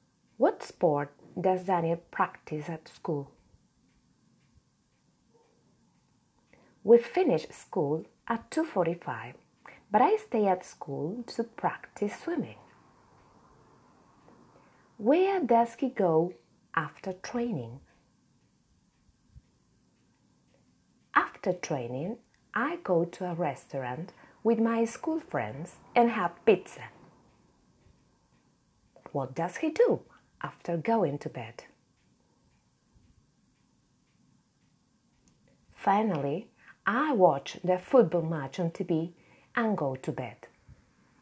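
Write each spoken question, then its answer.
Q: What sport does Daniel practice at school?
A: Swimming

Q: Where does he go after training?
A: To a restaurant with his school friends (for pizza)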